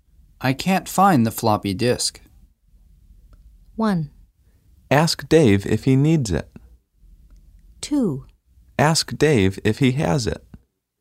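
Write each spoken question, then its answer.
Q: I can't find the floppy disk.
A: 2: Ask Dave if he has it.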